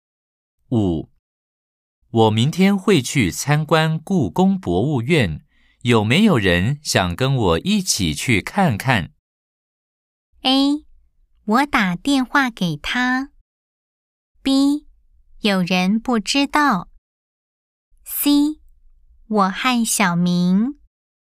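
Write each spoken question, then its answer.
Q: 我明天会去参观故宫博物院,有没有人想跟我一起去看看?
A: C: 我和小明。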